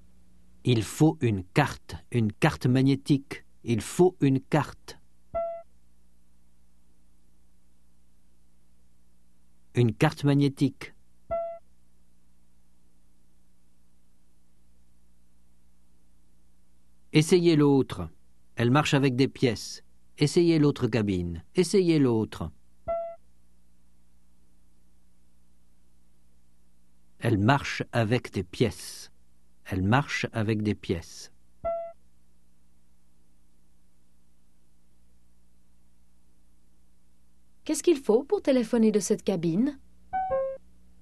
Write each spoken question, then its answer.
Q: Qu'est-ce qu'il faut pour téléphoner de cette cabine ?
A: Une carte magnétique.